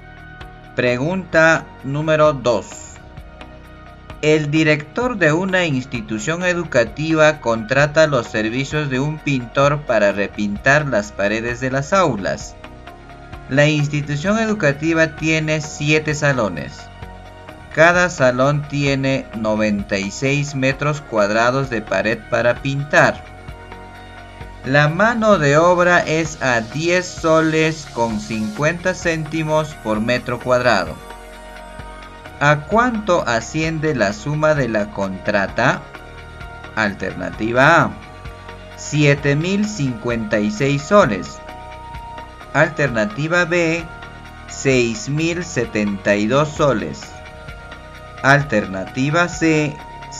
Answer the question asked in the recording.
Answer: Mi respuesta es la A, profesor.